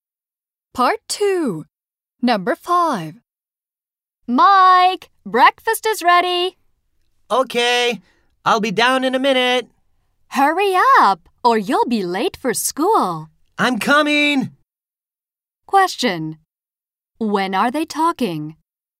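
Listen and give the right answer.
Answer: In the morning, before school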